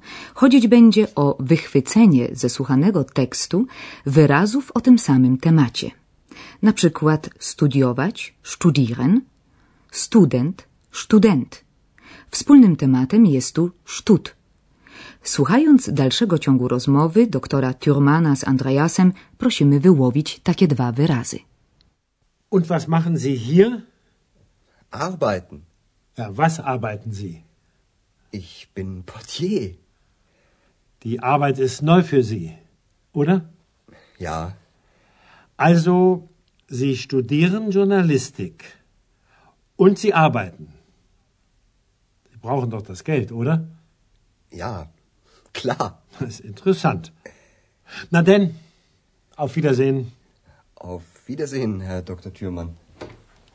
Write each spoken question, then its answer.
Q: Słuchając dalszego ciągu rozmowy doktora Thurmana z Andreasem, prosimy wyłowić takie dwa wyrazy.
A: Wyrazami tymi są arbeiten, pracować i arbeit, praca.